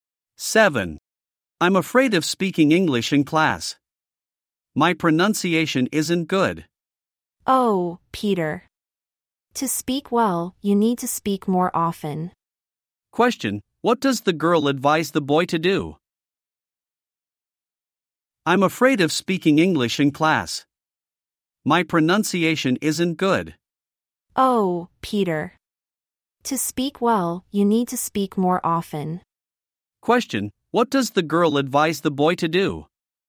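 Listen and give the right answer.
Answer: To speak more often.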